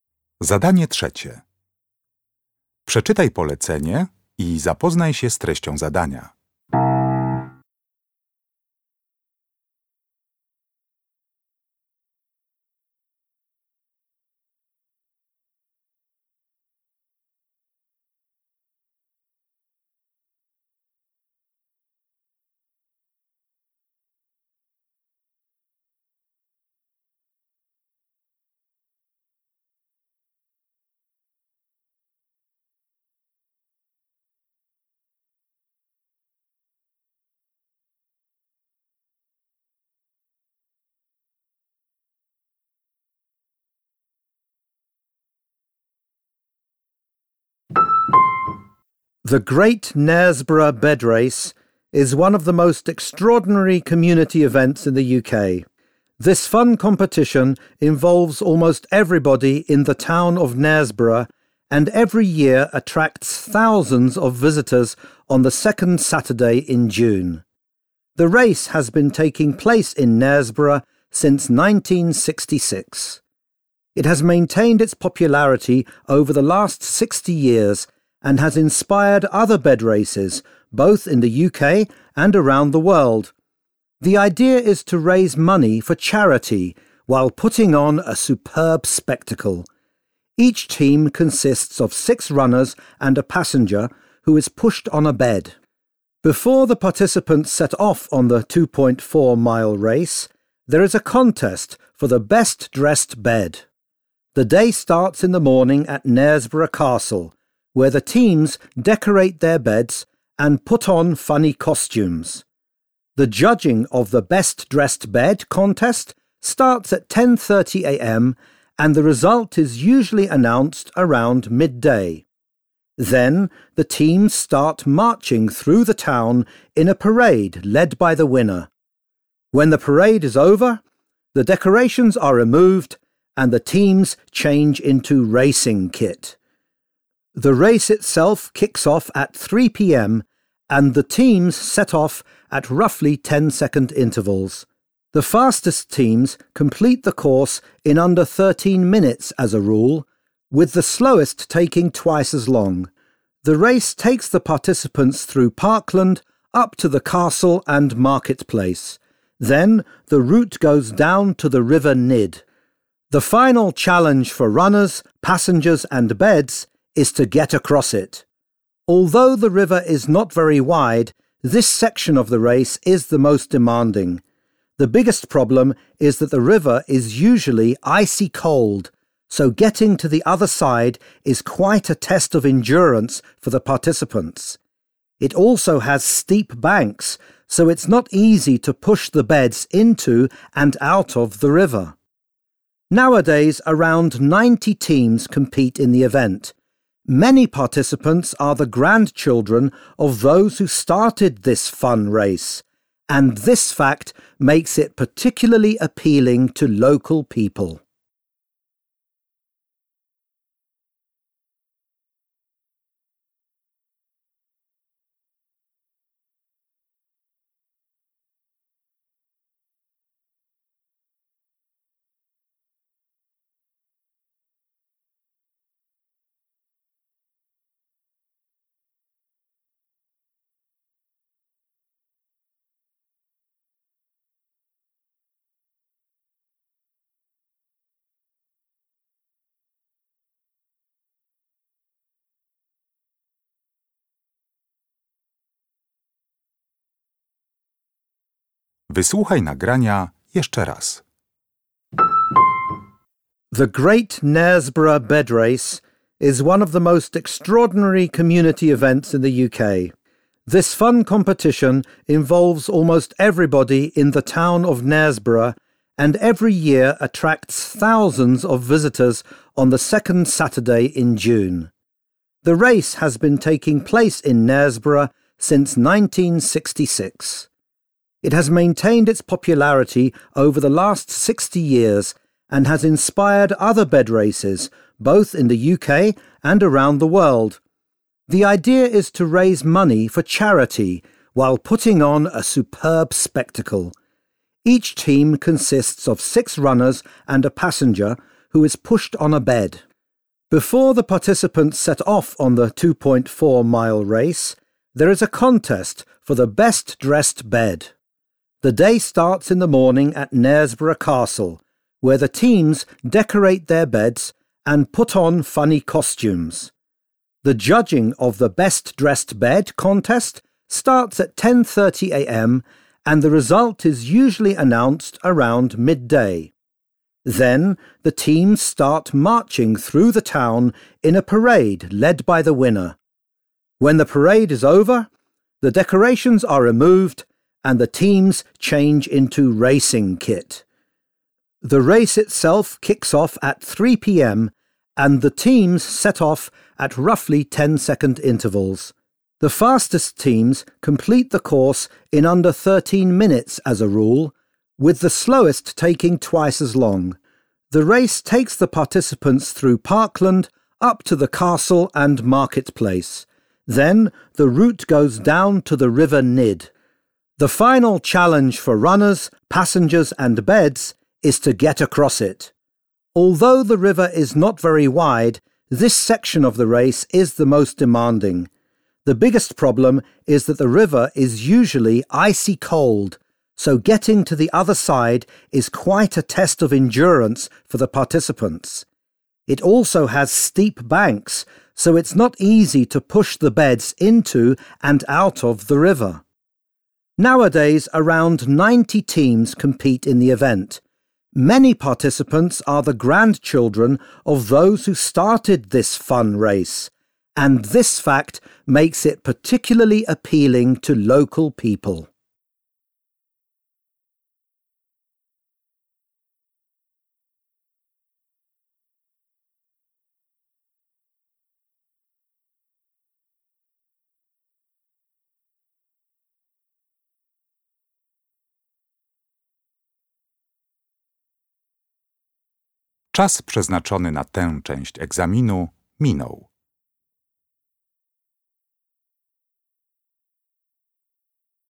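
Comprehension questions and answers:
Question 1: The bed race in Knaresborough was first held and has been popular ever since.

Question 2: Straight after the contest for the best-decorated bed, . The winning team leads the way.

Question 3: Teams leave the starting line of the race approximately every .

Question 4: Crossing the river is the most difficult part of the race mainly because of . Getting the beds in and out of the river is also a challenge.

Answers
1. in 1966
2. the teams march through the town in a parade
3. 10 seconds
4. the icy cold water

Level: Poziom: rozszerzony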